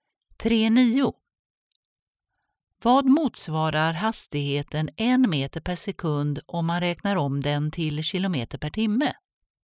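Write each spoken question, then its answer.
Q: Vad motsvarar hastigheten 1 meter per sekund om man räknar om den till kilometer per timme?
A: 3,6 km/h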